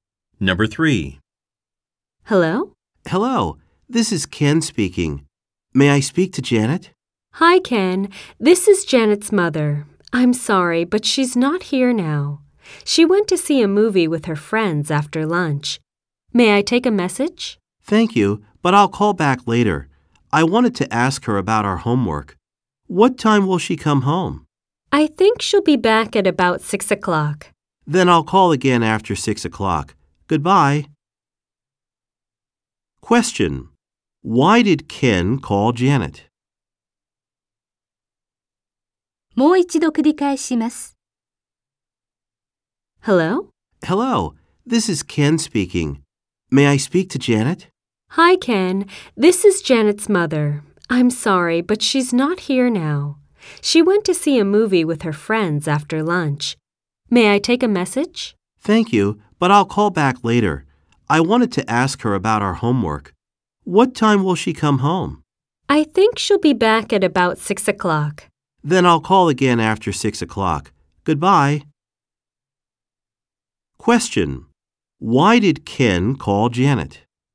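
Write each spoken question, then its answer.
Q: Question. Why did Ken call Janet?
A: To ask her about their homework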